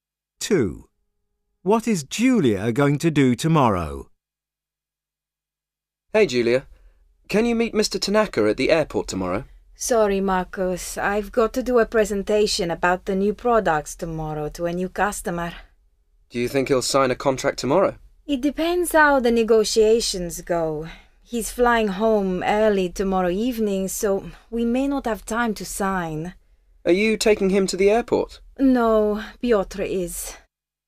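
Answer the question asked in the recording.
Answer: Give a presentation about the new products to a new customer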